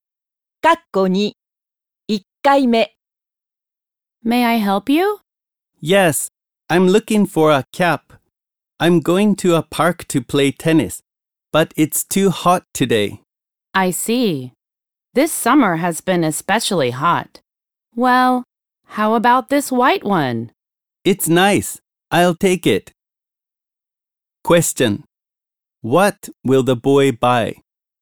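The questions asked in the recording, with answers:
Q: What will the boy buy?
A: A white cap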